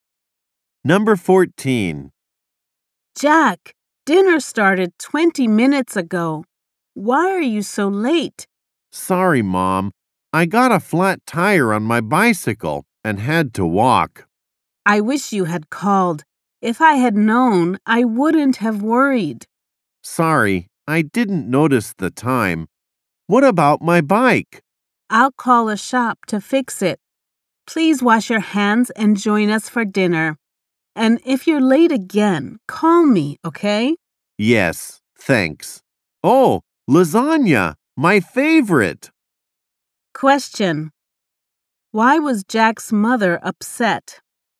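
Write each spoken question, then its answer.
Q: Why was Jack's mother upset?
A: He came home late and didn't call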